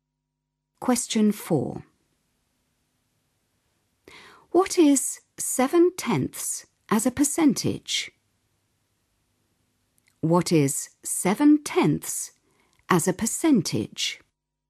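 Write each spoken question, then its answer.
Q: What is 7/10 as a percentage?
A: 70%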